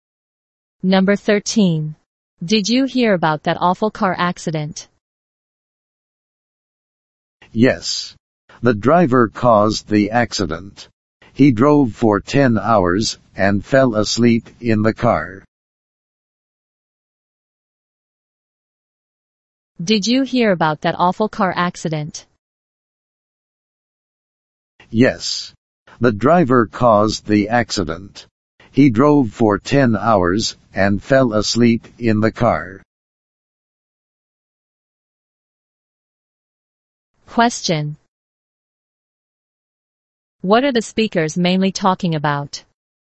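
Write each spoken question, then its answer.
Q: What are the speakers mainly talking about?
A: An awful car accident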